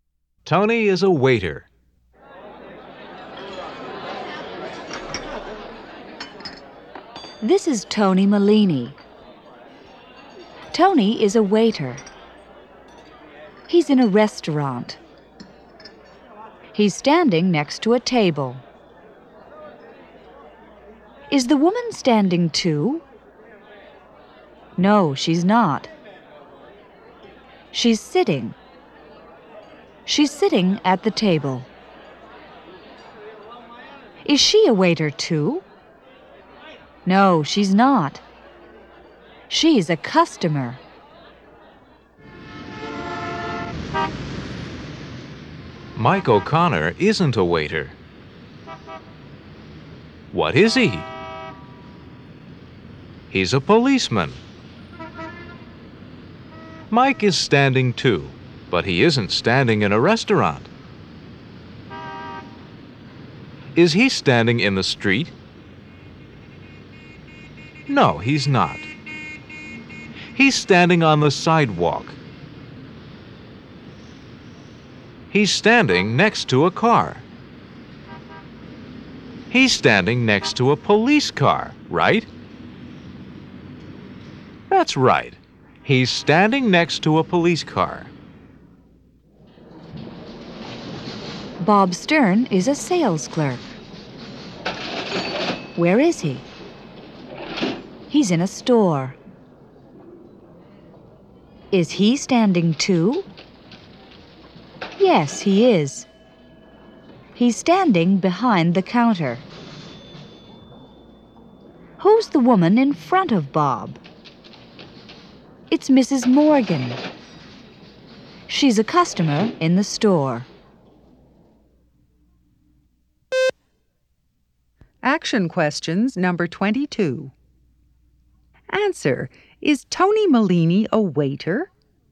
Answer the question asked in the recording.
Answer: Yes, he is.